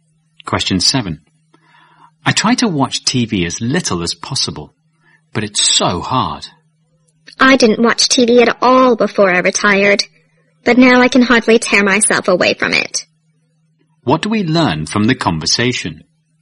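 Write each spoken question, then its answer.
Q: What do we learn from the conversation?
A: The man has watched a lot of TV since he retired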